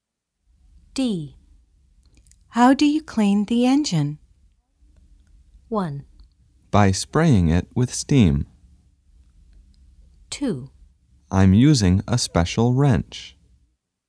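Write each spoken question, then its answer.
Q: How do you clean the engine?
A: 1: By spraying it with steam.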